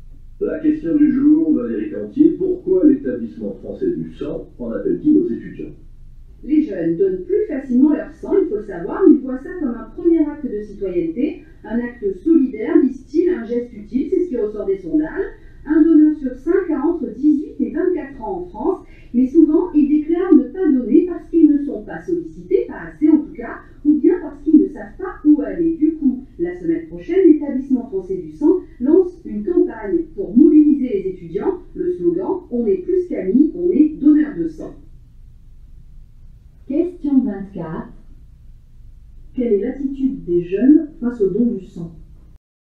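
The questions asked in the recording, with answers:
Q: Quelle est l'attitude des jeunes face au don du sang ?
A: Ils donnent plus facilement leur sang et le voient comme un acte citoyen et solidaire, mais ils disent ne pas être assez sollicités.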